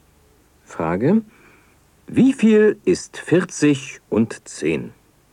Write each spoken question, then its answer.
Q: Wie viel ist 40 und 10?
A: 40 und 10 ist 50.